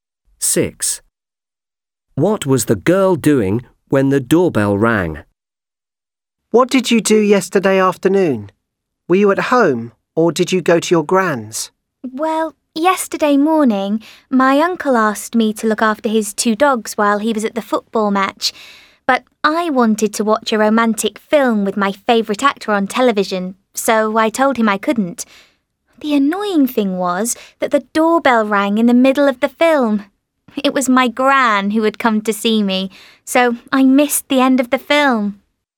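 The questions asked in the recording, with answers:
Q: What was the girl doing when the doorbell rang?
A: watching a romantic film on television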